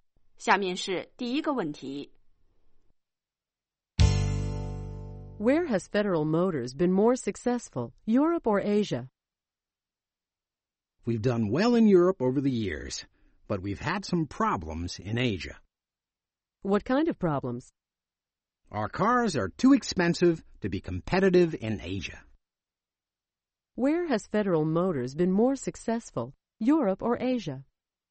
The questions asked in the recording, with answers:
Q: Where has Federal Motors been more successful, Europe or Asia?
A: They've been more successful in Europe.